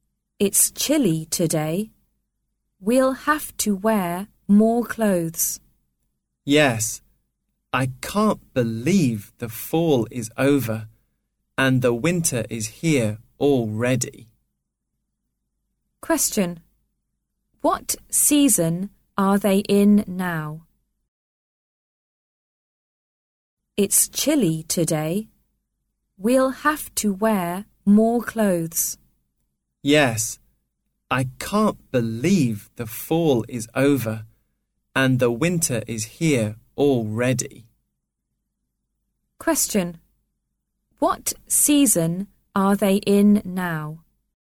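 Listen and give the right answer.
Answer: Winter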